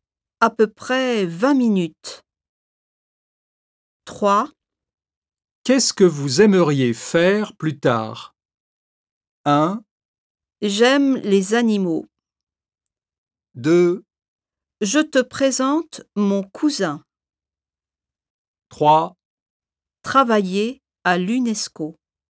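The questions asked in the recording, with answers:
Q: Qu'est-ce que vous aimeriez faire plus tard?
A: 3: Travailler à l'UNESCO.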